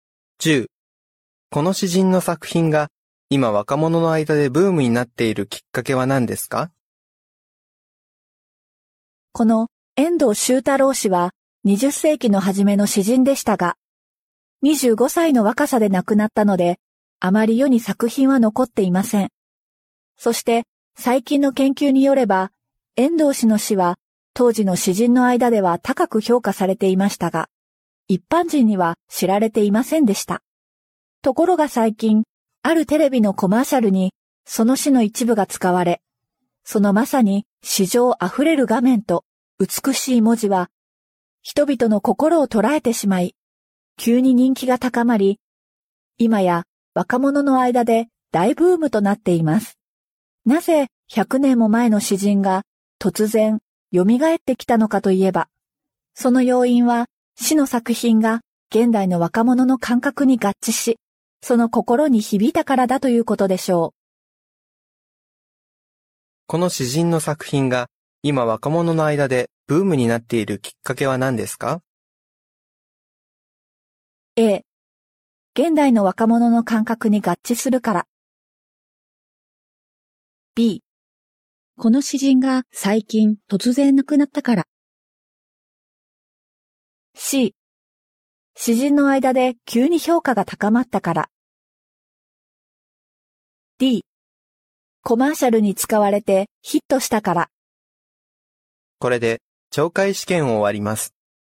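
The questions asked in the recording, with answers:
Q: この詩人の作品が今若者の間でブームになっているきっかけは何ですか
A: D コマーシャルに使われてヒットしたから。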